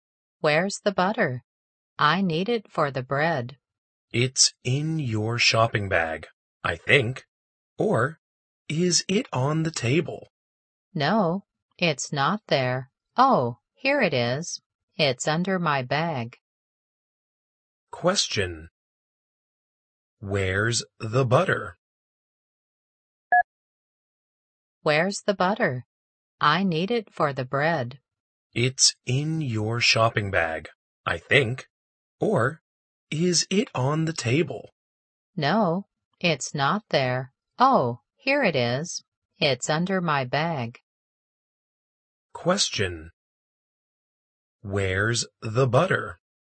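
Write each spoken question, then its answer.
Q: Where's the butter?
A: Under the bag.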